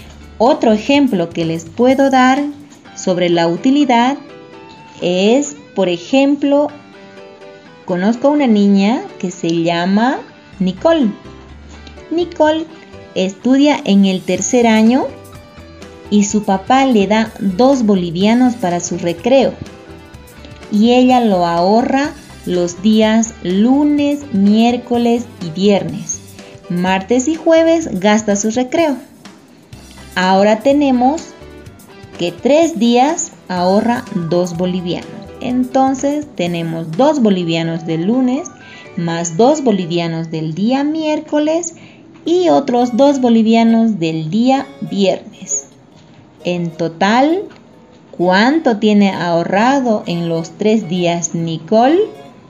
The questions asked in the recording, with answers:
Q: En total, ¿cuánto tiene ahorrado en los tres días Nicole?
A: Sí, muy bien, Seis.